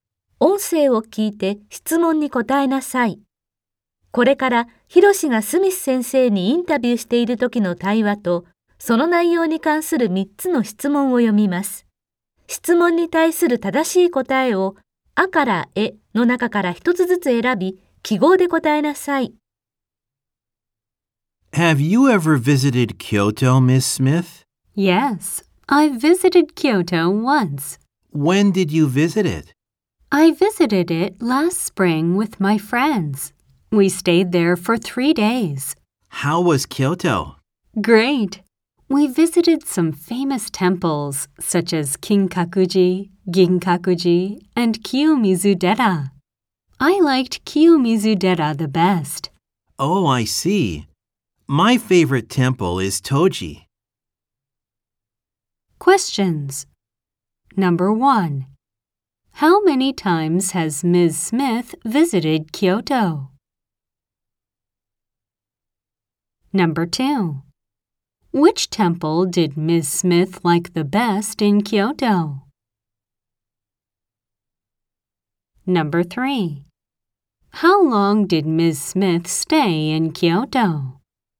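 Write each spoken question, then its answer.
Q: How many times has Ms. Smith visited Kyoto?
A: Once

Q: Which temple did Ms. Smith like the best in Kyoto?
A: Kiyomizu-dera

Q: How long did Ms. Smith stay in Kyoto?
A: For 3 days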